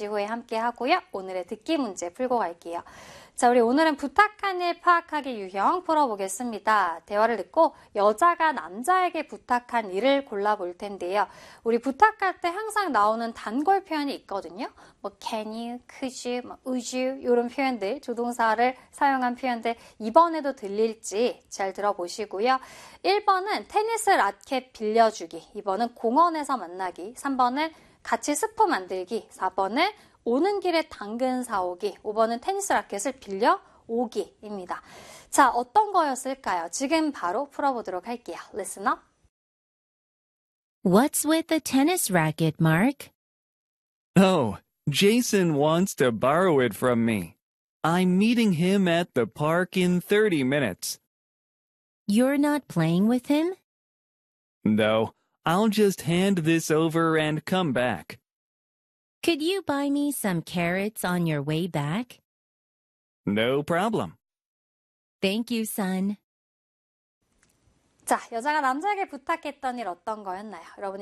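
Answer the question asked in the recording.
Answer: 4: 오는 길에 당근 사오기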